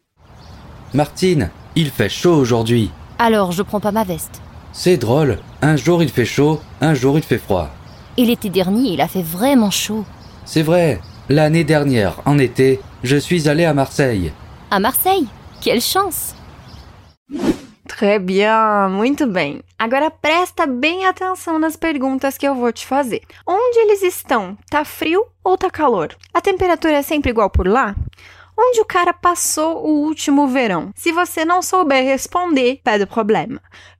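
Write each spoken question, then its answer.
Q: Tá frio ou tá calor?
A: Tá calor

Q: A temperatura é sempre igual por lá?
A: Não, um dia faz calor, outro dia faz frio

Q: Onde o cara passou o último verão?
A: Em Marseille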